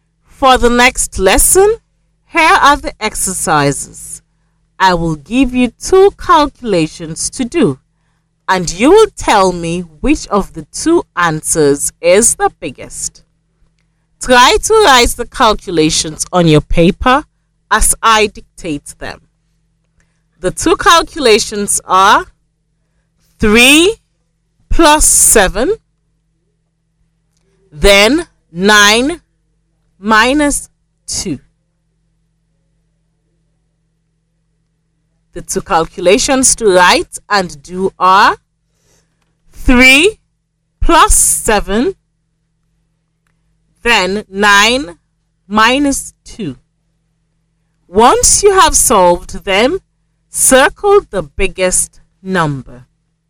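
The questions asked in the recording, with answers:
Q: The two calculations are 3 plus 7, then 9 minus 2.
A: 3 plus 7 (10) is bigger than 9 minus 2 (7)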